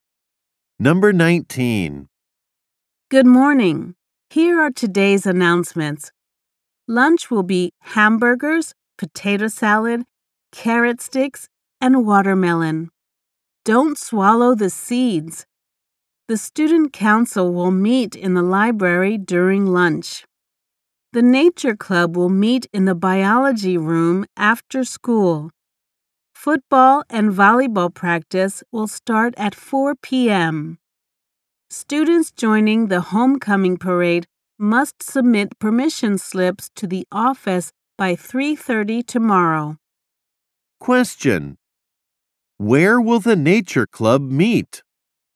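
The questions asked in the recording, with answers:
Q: Where will the nature club meet?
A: In the biology room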